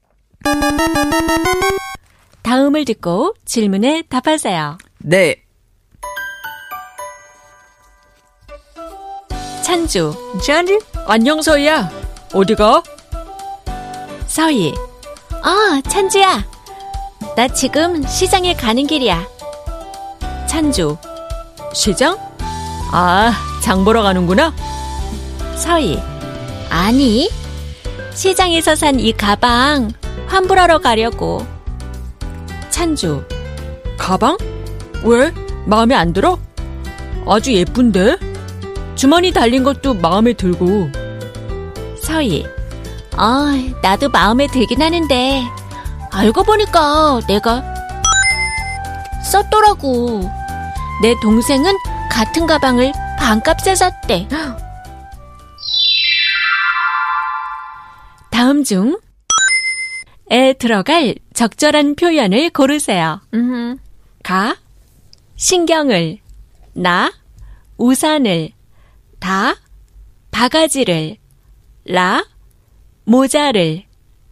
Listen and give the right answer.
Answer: 바가지를 쓰다,